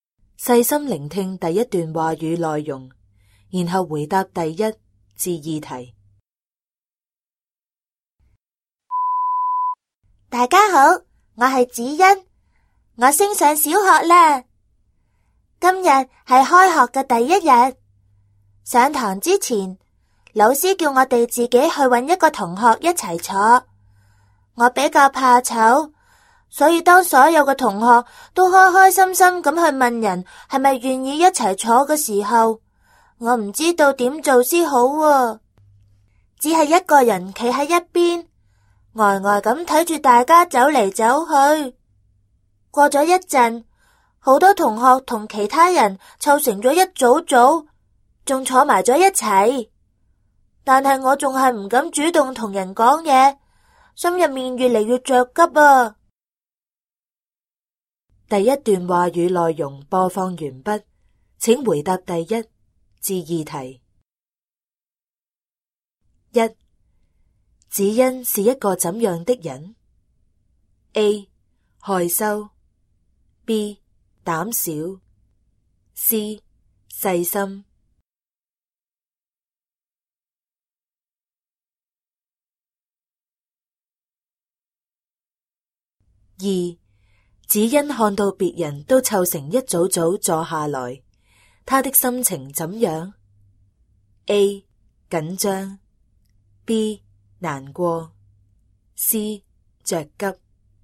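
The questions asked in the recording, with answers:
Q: 子欣是一个怎样的人?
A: A: 害羞

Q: 只因看到别人都凑成一组组坐下来,他的心情怎样?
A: C: 着急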